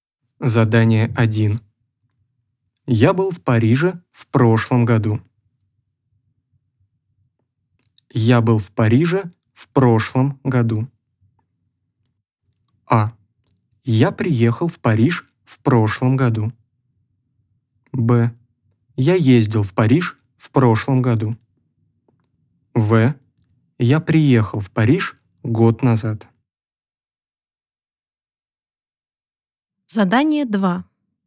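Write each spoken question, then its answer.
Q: Я был в Париже в прошлом году.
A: Б: Я ездил в Париж в прошлом году.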